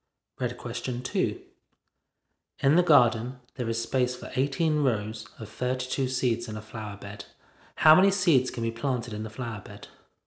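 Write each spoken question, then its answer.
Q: How many seeds can be planted in the flower bed?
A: 576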